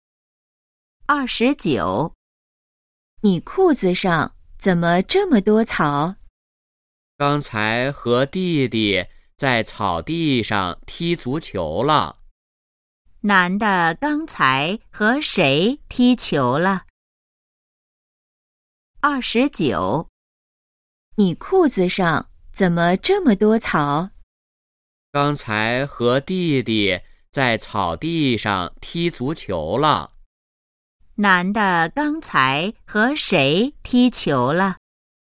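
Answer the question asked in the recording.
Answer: 弟弟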